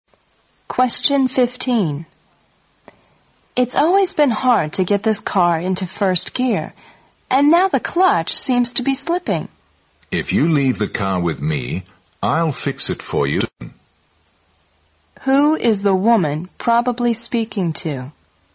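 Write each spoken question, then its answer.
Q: Who is the woman probably speaking to?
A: A car mechanic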